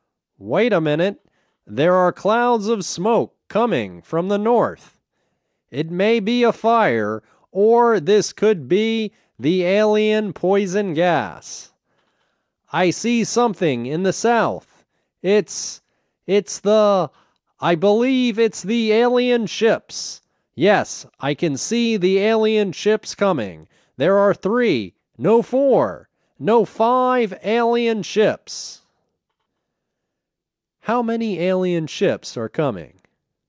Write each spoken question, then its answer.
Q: How many alien ships are coming?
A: There are five alien ships coming.